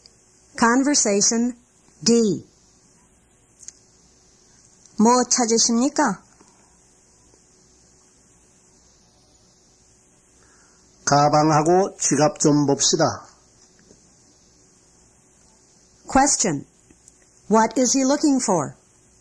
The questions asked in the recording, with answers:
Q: What is he looking for?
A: 'He's looking for a bag and a wallet.